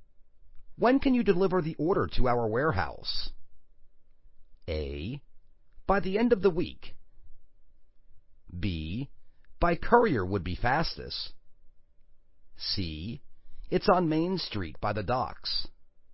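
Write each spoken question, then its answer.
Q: When can you deliver the order to our warehouse?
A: A: By the end of the week.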